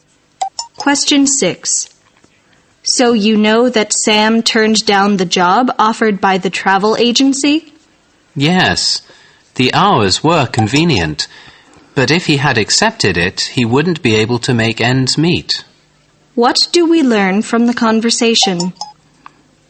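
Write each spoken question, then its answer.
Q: What do we learn from the conversation?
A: Sam turned down the job because the pay was too low to live on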